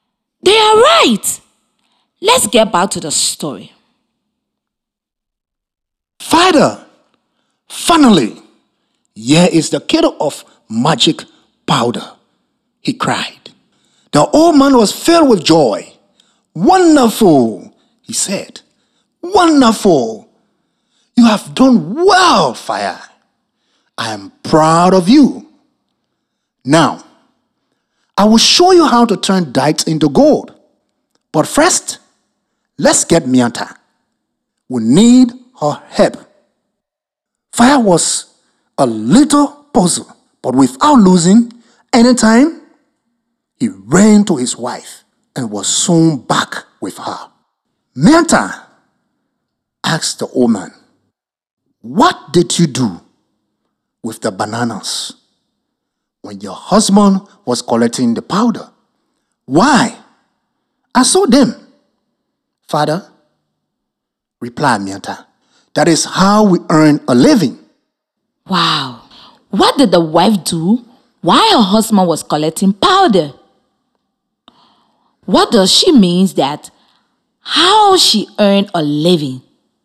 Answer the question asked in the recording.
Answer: She sold bananas, and that is how she made money.